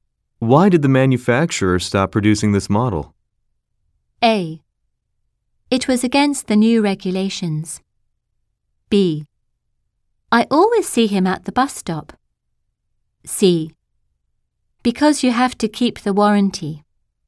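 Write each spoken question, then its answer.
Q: Why did the manufacturer stop producing this model?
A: A: It was against the new regulations.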